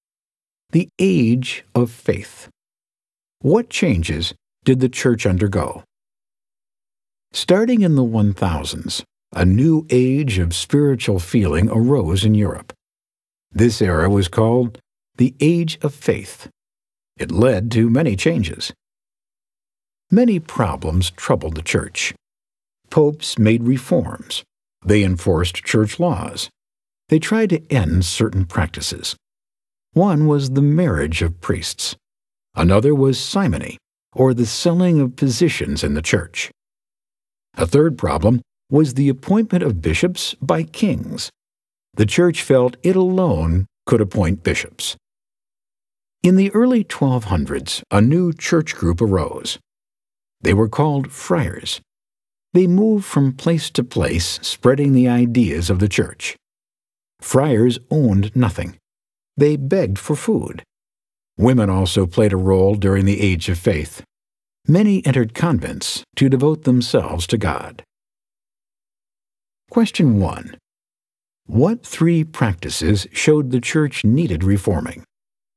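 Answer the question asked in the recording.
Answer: Marriage of priests, simony (selling church positions), and kings appointing bishops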